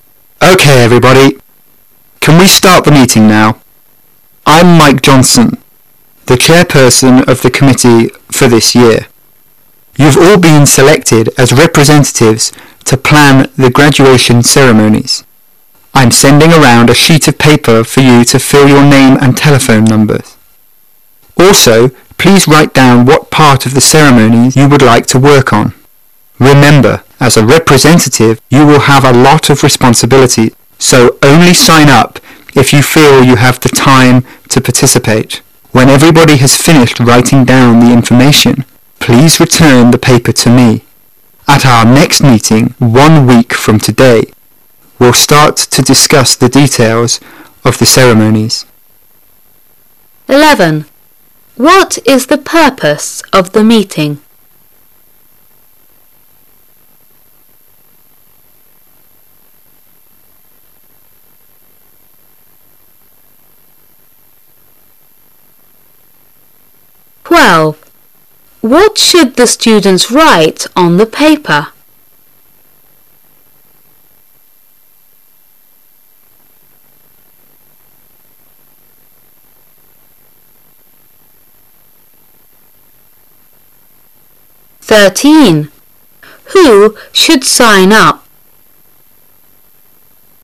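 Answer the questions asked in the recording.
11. To plan the graduation ceremonies
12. Their names, telephone numbers, and the part of the ceremony they would like to work on
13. Only those who have time to participate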